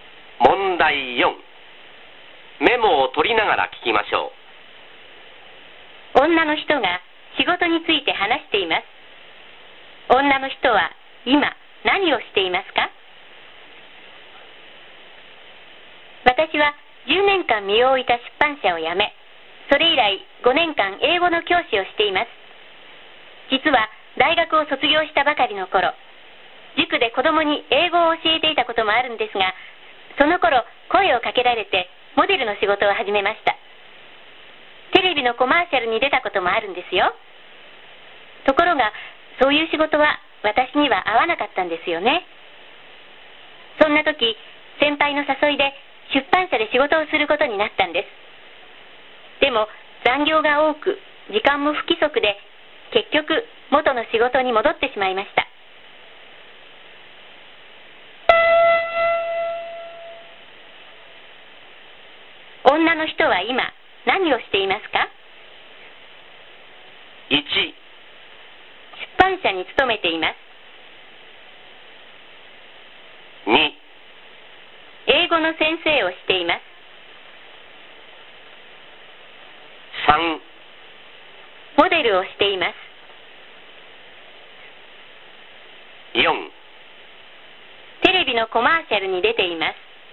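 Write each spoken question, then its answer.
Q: 女の人は今何をしていますか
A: 2: 英語の先生をしています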